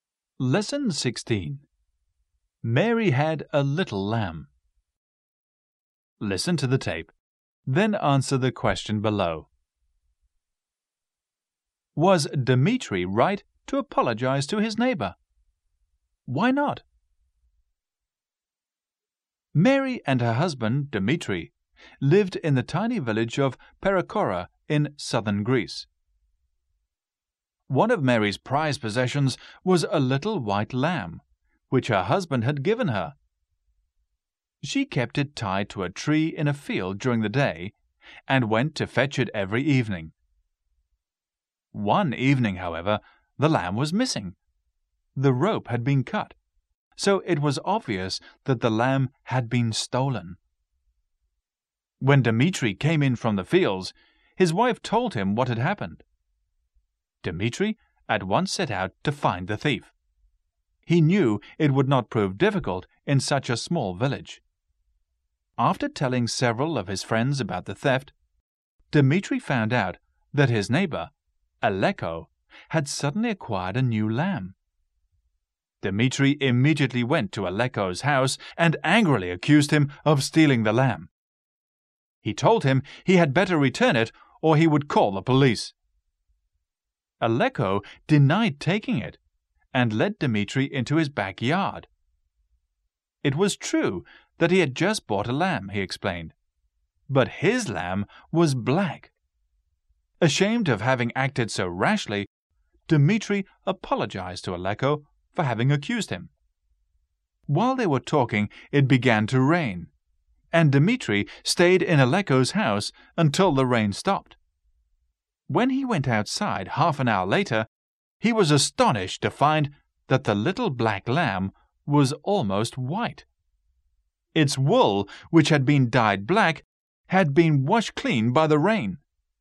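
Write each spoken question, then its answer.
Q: Was Dmitri right to apologize to his neighbor?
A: No, because Aleko had stolen the lamb and dyed it black; the rain washed the dye off and showed it was white.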